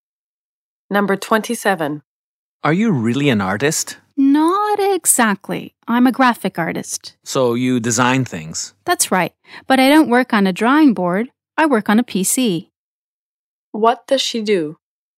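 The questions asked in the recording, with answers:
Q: What does she do?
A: She's a graphic artist who designs on a PC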